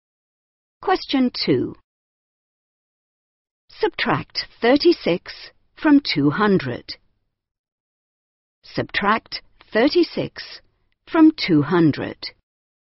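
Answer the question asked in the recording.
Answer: 164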